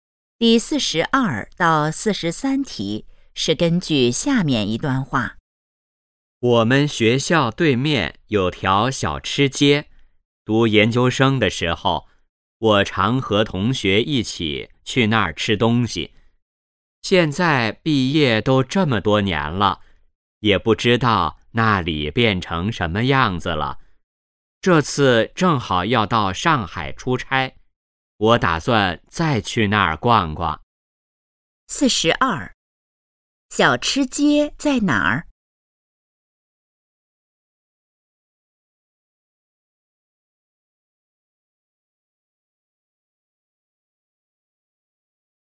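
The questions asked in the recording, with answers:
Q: 小吃街在哪儿?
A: 学校对面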